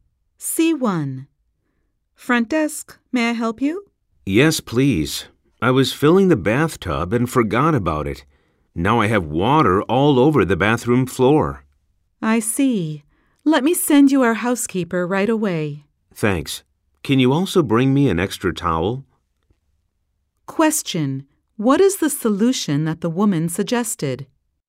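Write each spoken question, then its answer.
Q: What is the solution that the woman suggested?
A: To send a housekeeper to the room right away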